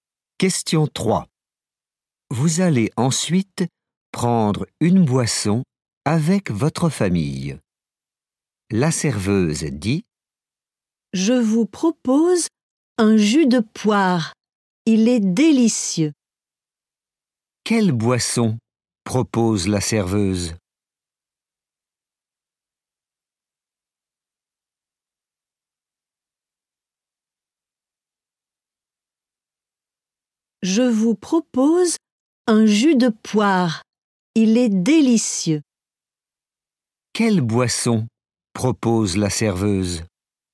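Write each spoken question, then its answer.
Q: Quelle boisson propose la serveuse?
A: un jus de poire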